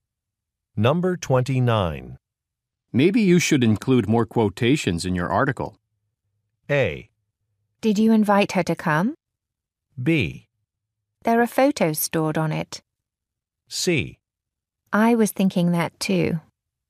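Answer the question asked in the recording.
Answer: C: I was thinking that too.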